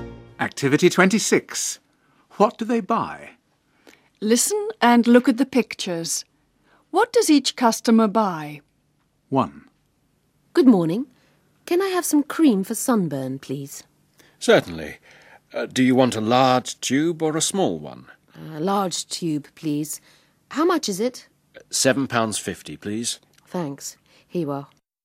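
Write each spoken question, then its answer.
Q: What does each customer buy?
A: A large tube of cream for sunburn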